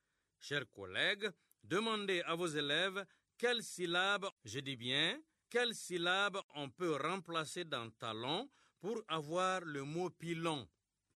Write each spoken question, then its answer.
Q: Chers collègues, demandez à vos élèves quelle syllabe, je dis bien, quelle syllabe on peut remplacer dans talon pour avoir le mot pilon.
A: Dans talon, on remplace la syllabe ta par la syllabe pi pour avoir pilon.